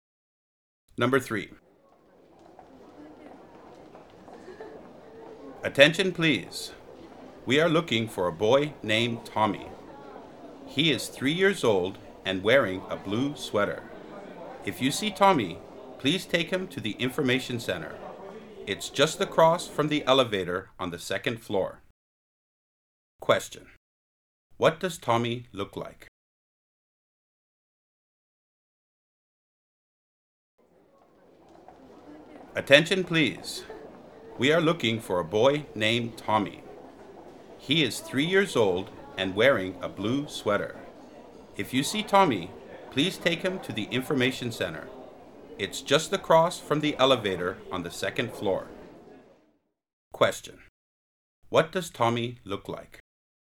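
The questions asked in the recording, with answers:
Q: What does Tommy look like?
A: He is 3 years old and wearing a blue sweater.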